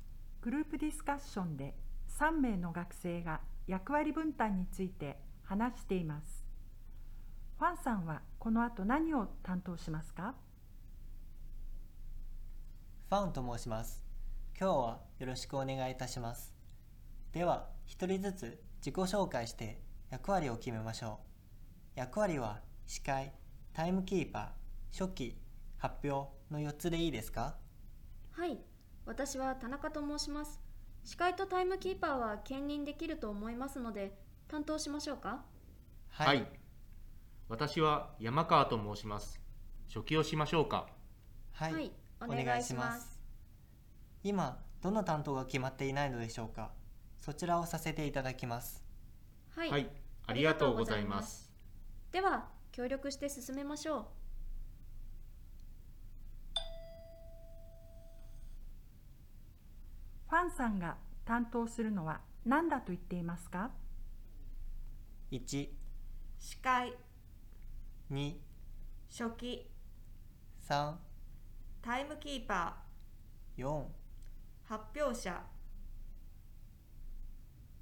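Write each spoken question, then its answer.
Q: ファンさんが担当するのは何だと言っていますか?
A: 4: 発表者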